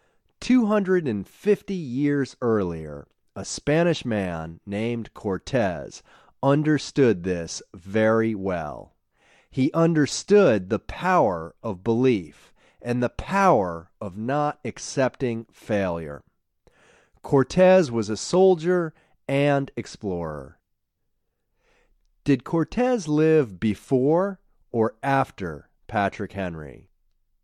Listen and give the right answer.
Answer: Cortez lived 250 years before Patrick Henry.